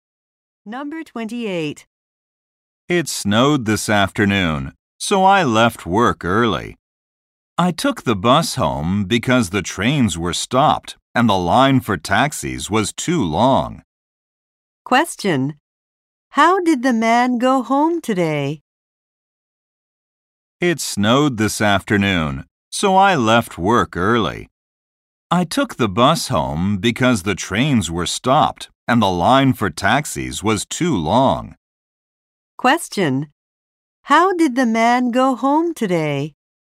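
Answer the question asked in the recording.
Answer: By bus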